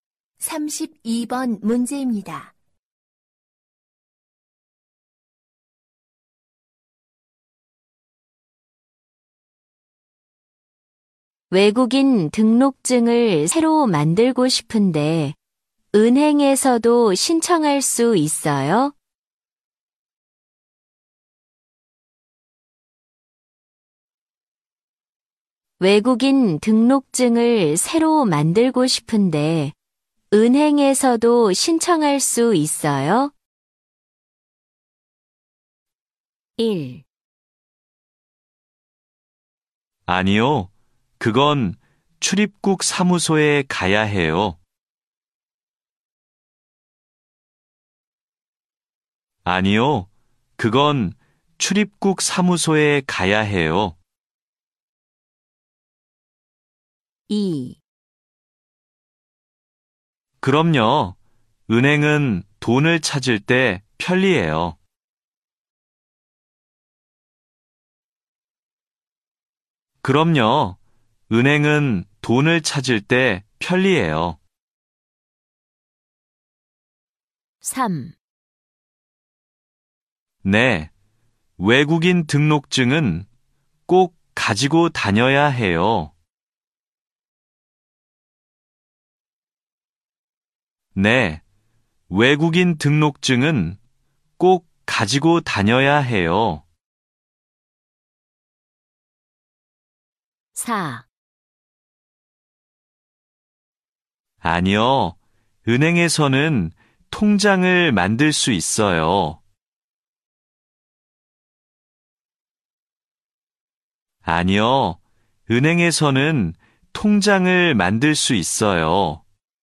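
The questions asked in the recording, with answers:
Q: 외국인 등록증을 새로 만들고 싶은데 은행에서도 신청할 수 있어요?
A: 1: 아니요. 그건 출입국 사무소에 가야 해요.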